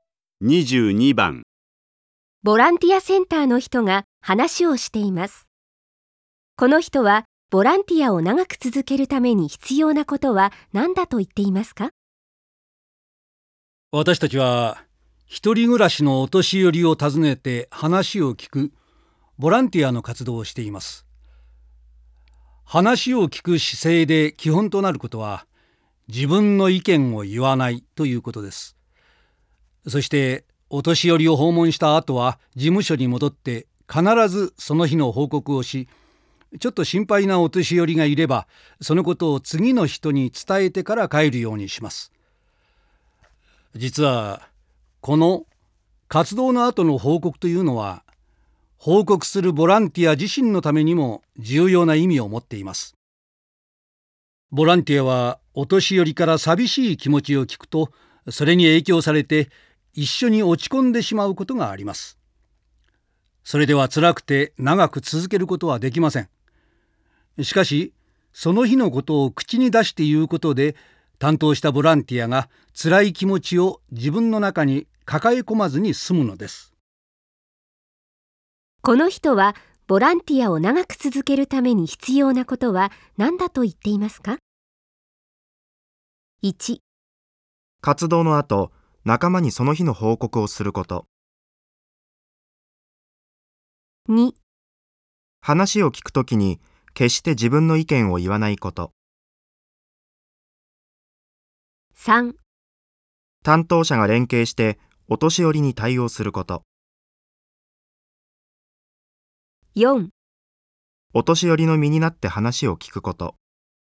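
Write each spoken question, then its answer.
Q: この人はボランティアを長く続けるために必要なことは何だと言っていますか?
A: 1: 活動の後、仲間にその日の報告をすること。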